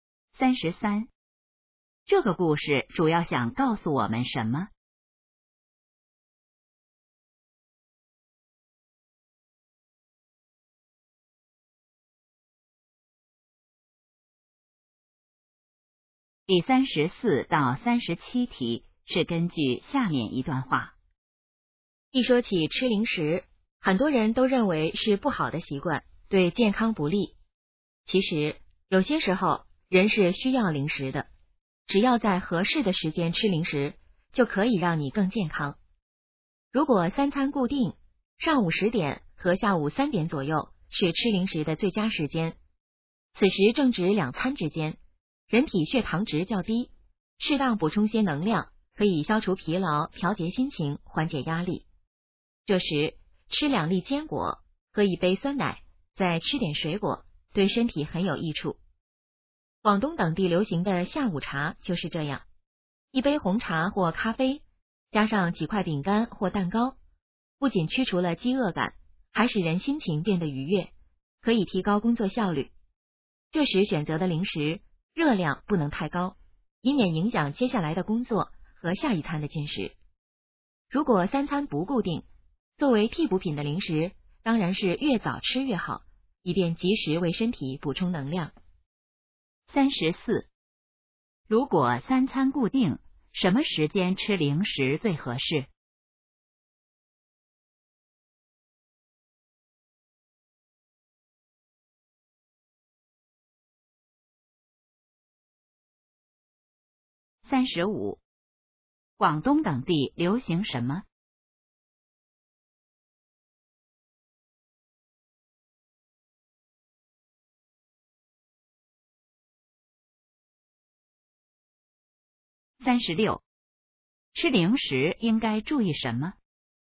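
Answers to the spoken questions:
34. 上午10点和下午3点左右
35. 下午茶
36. 热量不能太高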